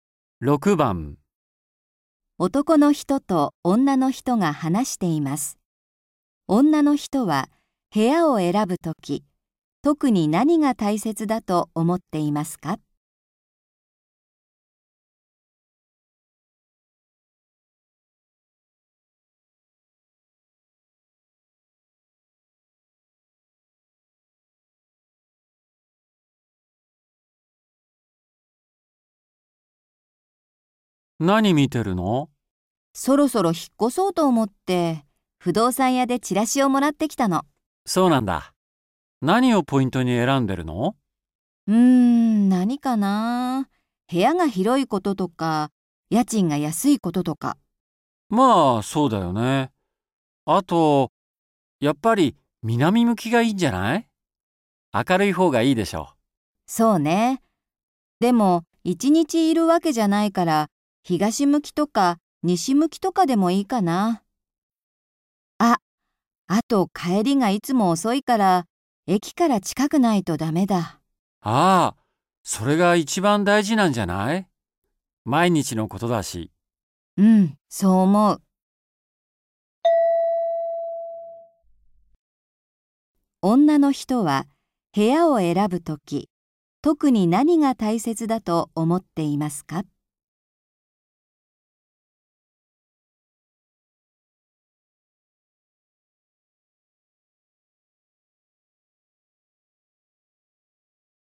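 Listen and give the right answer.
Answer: 駅から近いこと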